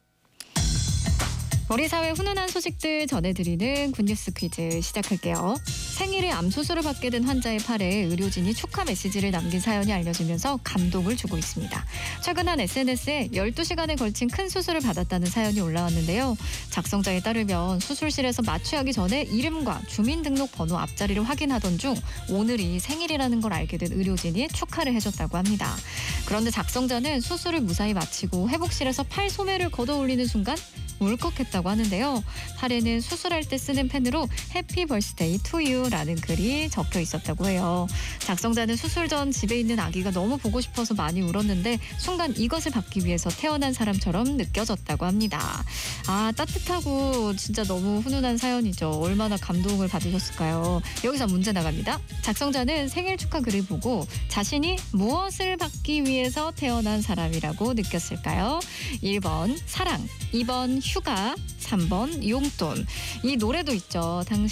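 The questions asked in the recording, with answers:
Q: 작성자는 생일 축하 글을 보고 자신이 무엇을 받기 위해서 태어난 사람이라고 느꼈을까요?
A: 1번: 사랑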